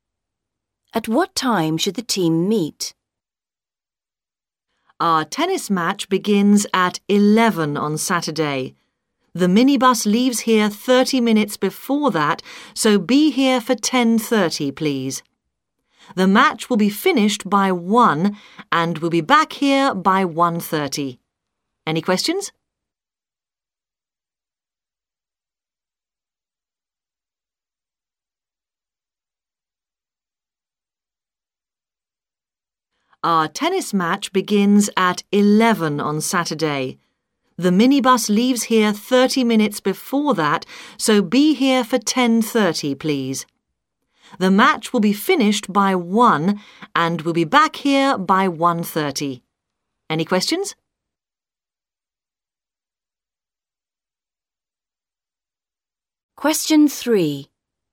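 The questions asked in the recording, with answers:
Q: At what time should the team meet?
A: 10:30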